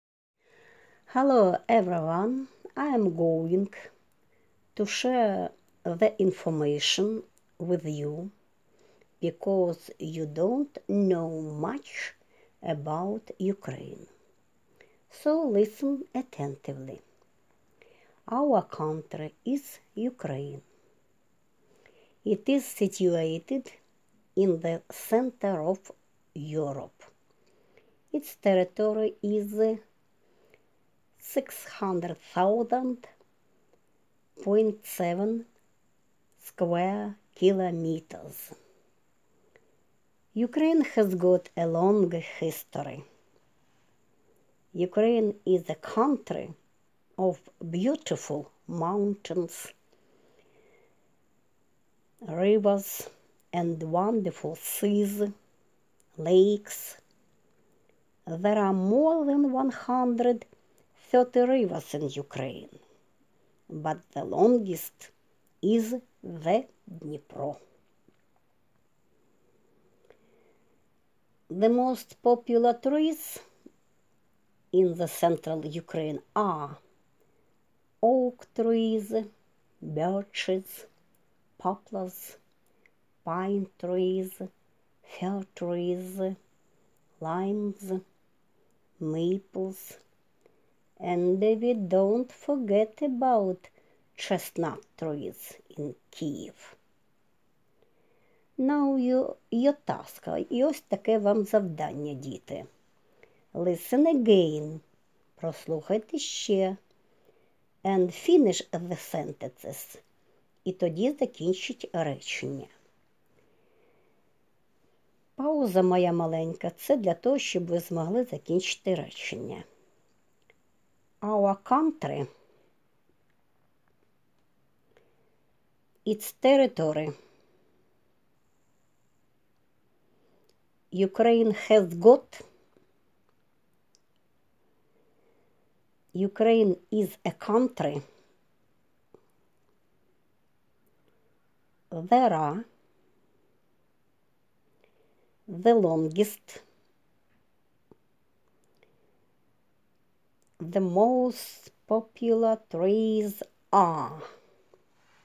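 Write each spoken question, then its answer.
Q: Our country,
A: is Ukraine

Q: Ukraine has got.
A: a long history

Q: Ukraine is a country.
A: of beautiful mountains, rivers, and wonderful seas, lakes

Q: There are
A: more than 130 rivers in Ukraine

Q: the longest.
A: is the Dnipro

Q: The most popular trees are.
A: oak trees, birches, poplars, pine trees, fir trees, limes, maples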